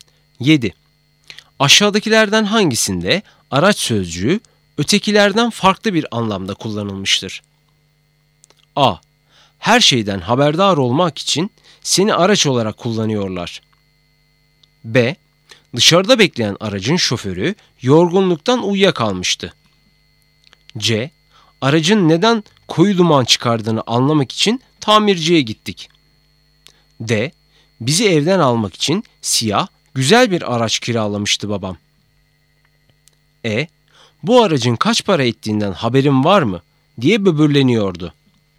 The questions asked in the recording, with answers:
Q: Aşağıdakilerden hangisinde araç sözcüğü ötekilerden farklı bir anlamda kullanılmıştır?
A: Doğru cevap A. Her şeyden haberdar olmak için seni araç olarak kullanıyorlar.